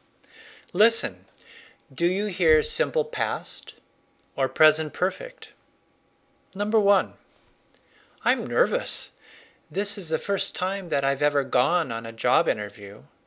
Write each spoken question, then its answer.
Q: Listen, do you hear simple past or present perfect?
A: Present perfect.